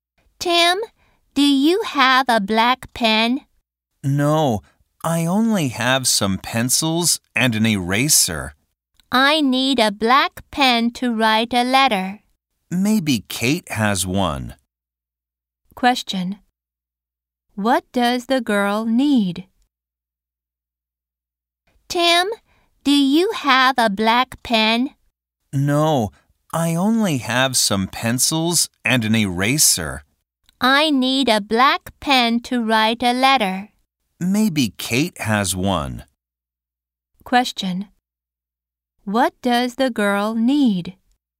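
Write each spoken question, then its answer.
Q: What does the girl need?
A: A black pen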